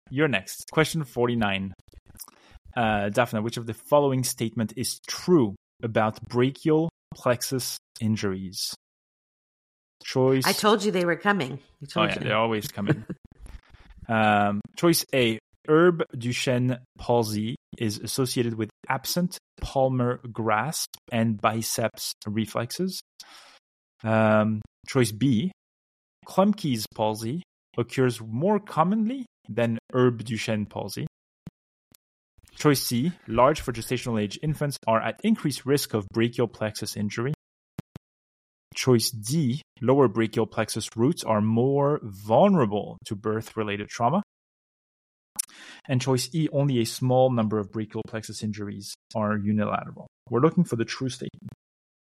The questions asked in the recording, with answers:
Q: Uh, Daphna, which of the following statement is true about brachial plexus injuries?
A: So I guess C